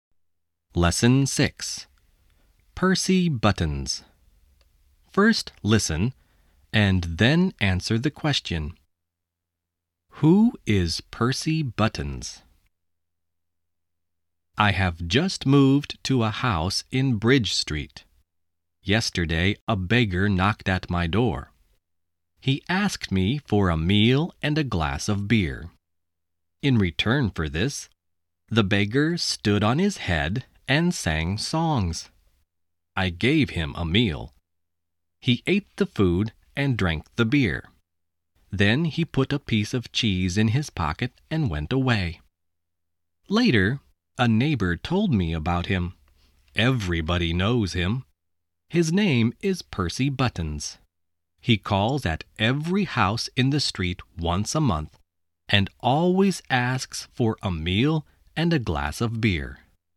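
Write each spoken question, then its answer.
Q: Who is Percy Buttons?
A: A beggar who calls at every house in the street once a month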